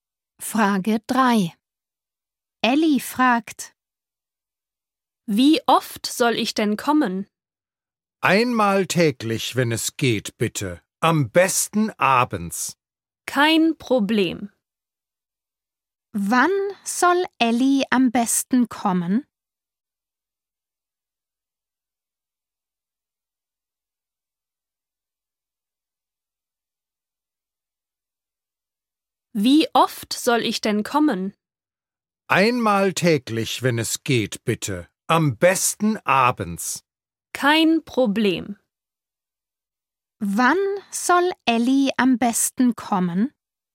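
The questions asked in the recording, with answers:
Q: Wann soll Ellie am besten kommen?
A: abends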